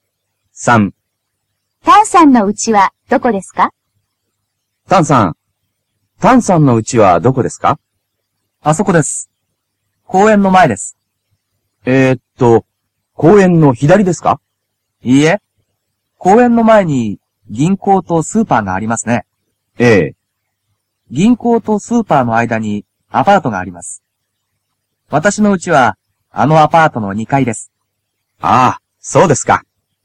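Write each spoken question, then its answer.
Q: タンさんの家はどこですか?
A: 公園の前の銀行とスーパーの間のアパートの2階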